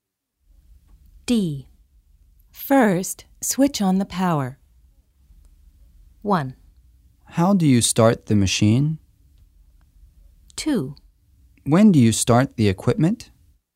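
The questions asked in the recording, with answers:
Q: First, switch on the power.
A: 1: How do you start the machine?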